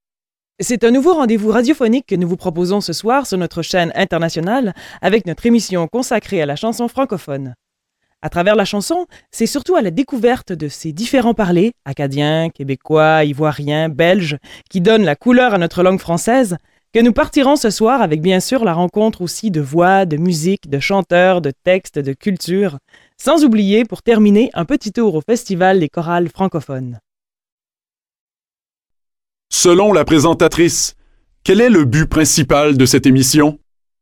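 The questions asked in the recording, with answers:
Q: Selon la présentatrice, quel est le but principal de cette émission?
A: Faire découvrir les différents parlers francophones (acadiens, québécois, ivoiriens, belges) à travers la chanson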